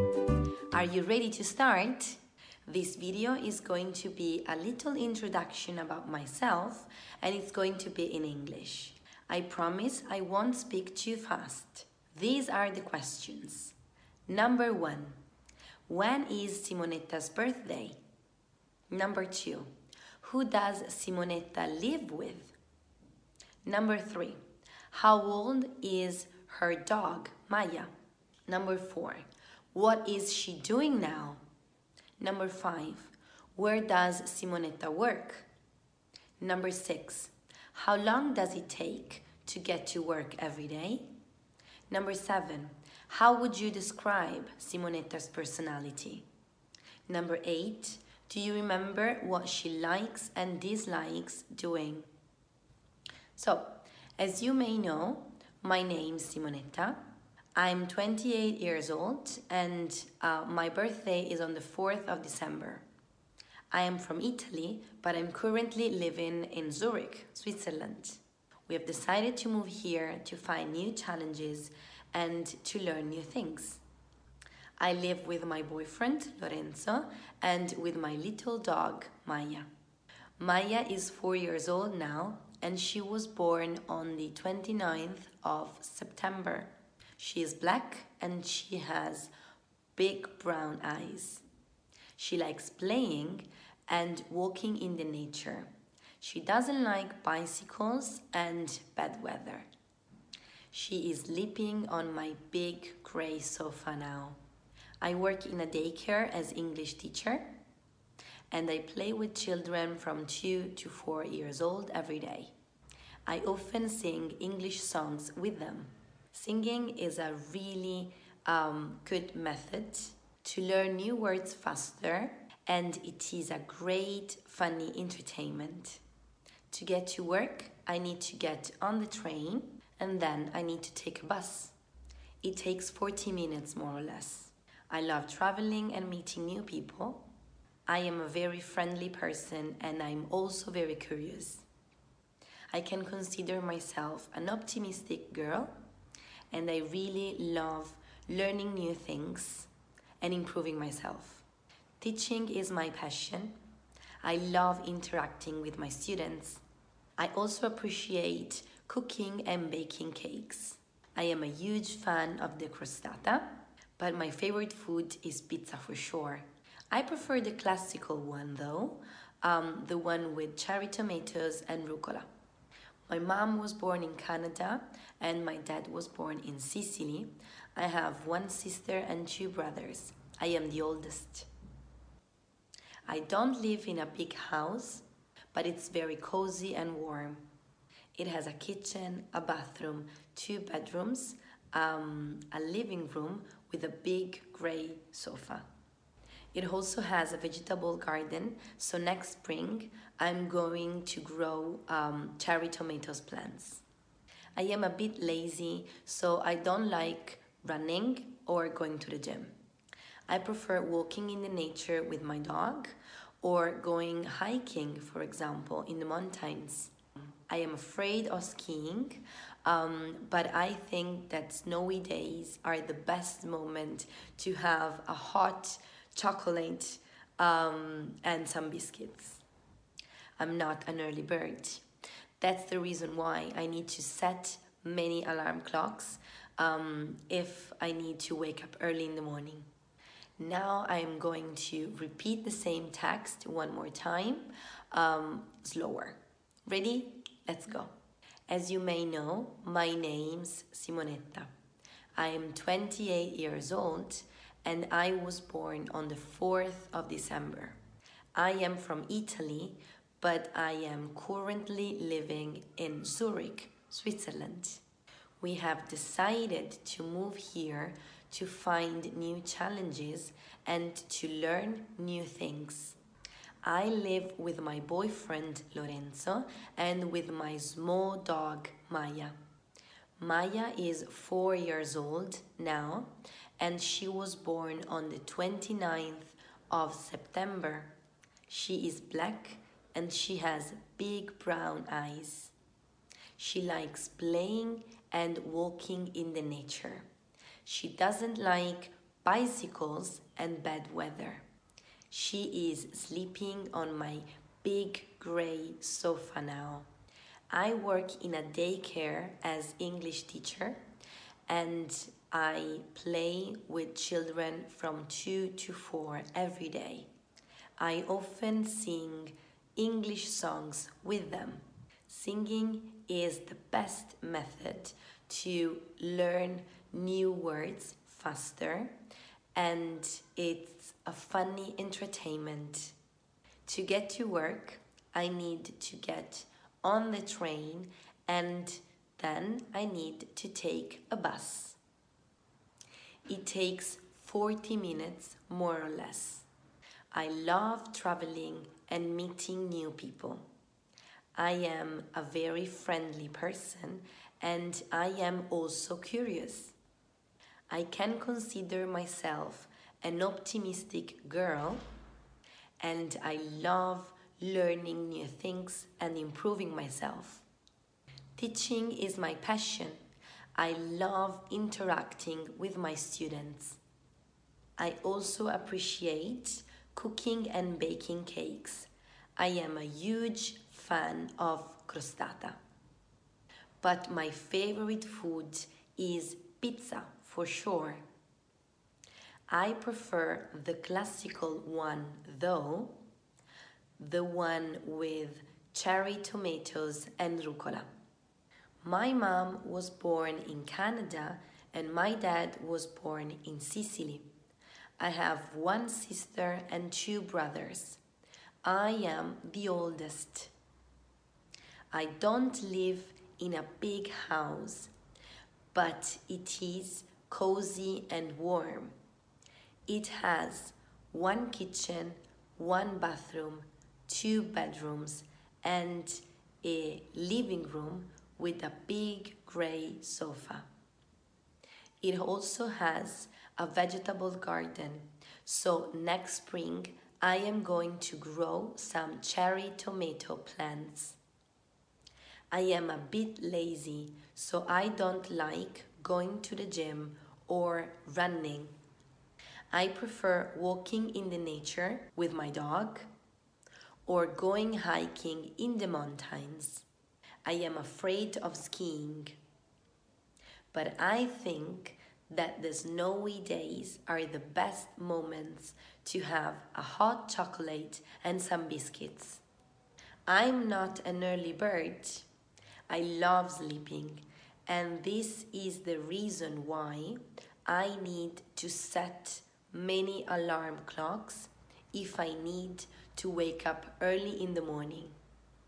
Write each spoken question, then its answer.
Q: when is Simonetta's birthday?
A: Simonetta's birthday is on the 4th of December.

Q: who does Simonetta live with?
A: Simonetta lives with her boyfriend Lorenzo, and her little dog Maya.

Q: how old is her dog, Maya?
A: Maya is 4 years old.

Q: what is she doing now?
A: She is sleeping on the sofa now.

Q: where does Simonetta work?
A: Simonetta works in a daycare in Zurich.

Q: how long does it take to get to work every day?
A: It takes 40 minutes, more or less.

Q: how would you describe Simonetta's personality?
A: Simonetta is a very friendly person, also very curious and optimistic.

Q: do you remember what she likes and dislikes doing?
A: She likes cooking and baking cakes, and she dislikes going to the gym and running.